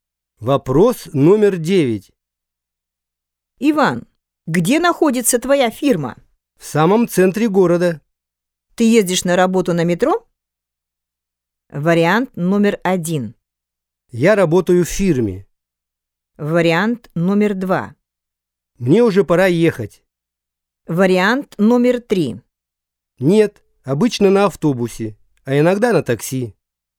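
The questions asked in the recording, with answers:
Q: Ты ездишь на работу на метро?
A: 3: Нет, обычно на автобусе, а иногда на такси.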